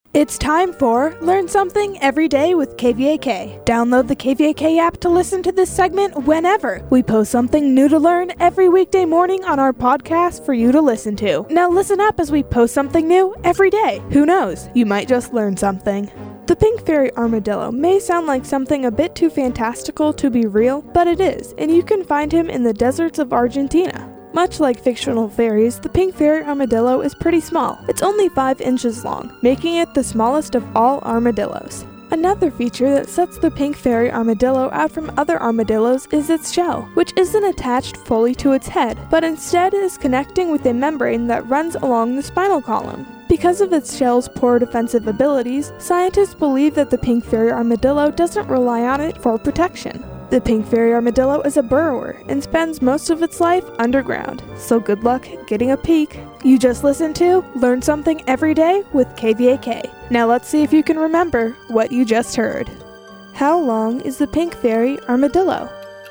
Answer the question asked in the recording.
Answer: The pink fairy armadillo is 5 inches long.